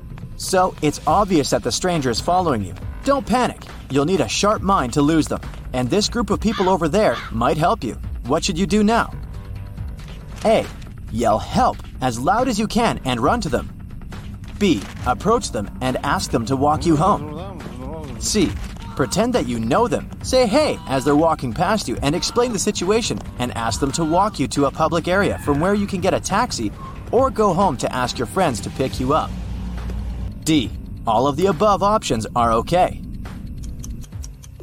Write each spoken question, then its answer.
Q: What should you do now?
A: The only correct answer here is C.